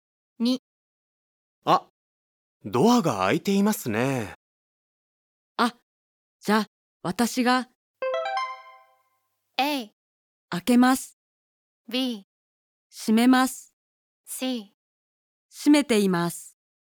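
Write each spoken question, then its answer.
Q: あ、じゃあ私が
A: B: 閉めます。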